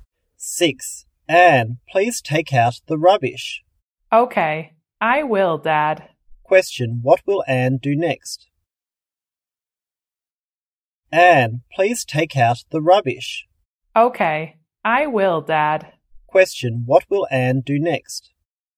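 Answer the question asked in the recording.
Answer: Take out the rubbish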